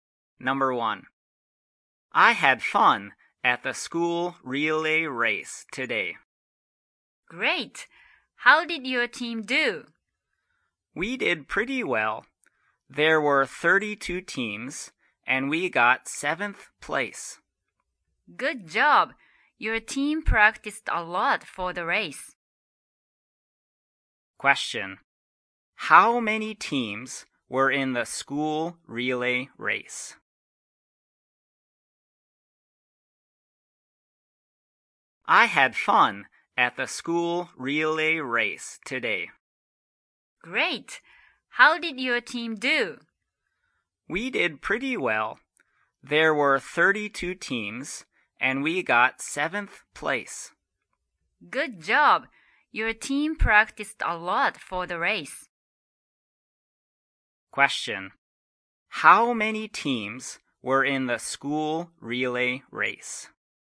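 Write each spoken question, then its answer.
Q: How many teams were in the school relay race?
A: 32 teams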